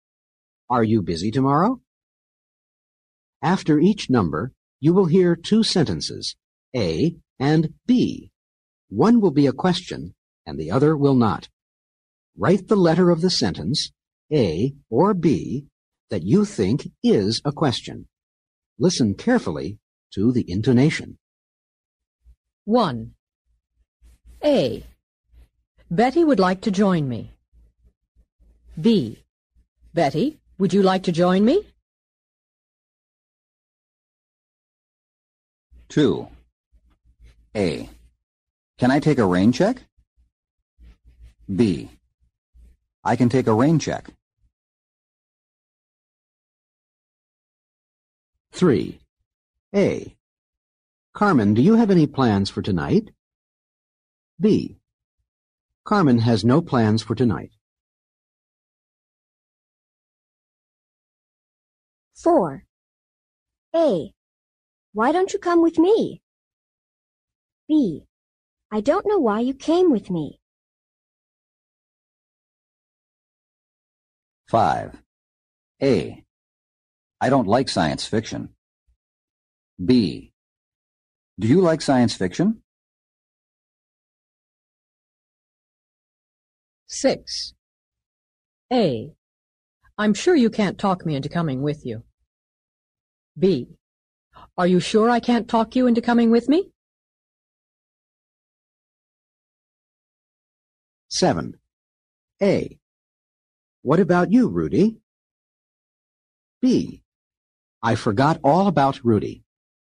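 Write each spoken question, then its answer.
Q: Write the letter of the sentence, A or B, that you think is a question.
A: B: Betty, would you like to join me?

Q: Write the letter of the sentence, A or B, that you think is a question.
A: A: Can I take a rain check?

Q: Write the letter of the sentence, A or B, that you think is a question.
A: A: Carmen, do you have any plans for tonight?

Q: Write the letter of the sentence, A or B, that you think is a question.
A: A: Why don't you come with me?

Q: Write the letter of the sentence, A or B, that you think is a question.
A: B: Do you like science fiction?

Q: Write the letter of the sentence, A or B, that you think is a question.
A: B: Are you sure I can't talk you into coming with me?

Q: Write the letter of the sentence, A or B, that you think is a question.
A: A: What about you, Rudy?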